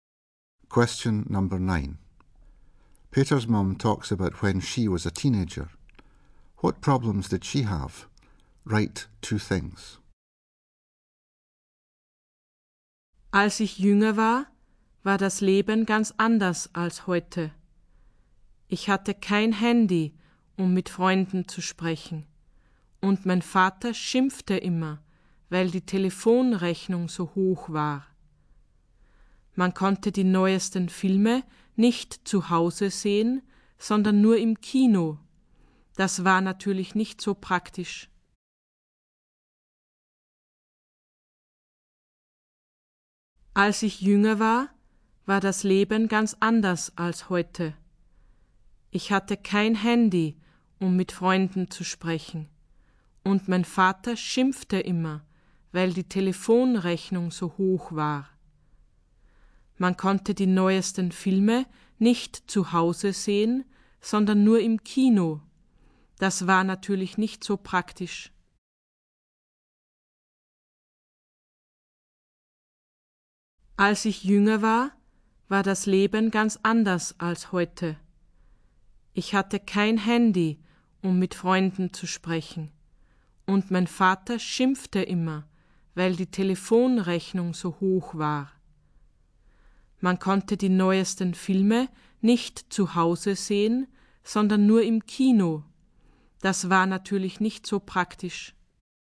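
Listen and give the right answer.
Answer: No mobile phone, father complained about high phone bill; couldn't watch latest films at home, only in cinema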